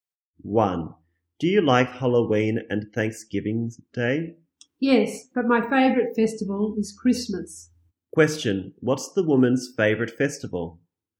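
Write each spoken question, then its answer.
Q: Question, what's the woman's favorite festival?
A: Christmas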